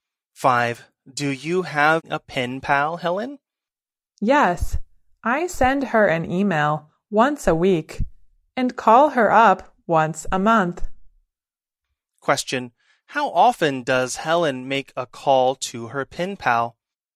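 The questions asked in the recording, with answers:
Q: How often does Helen make a call to her pen pal?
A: Once a month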